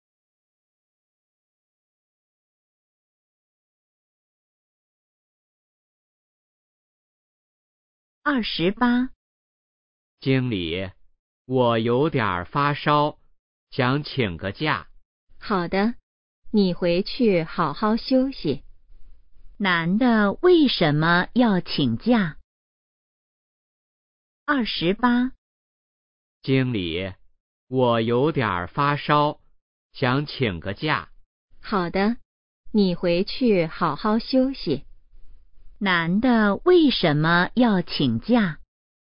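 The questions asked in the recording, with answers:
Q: 男的为什么要请假?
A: 发烧了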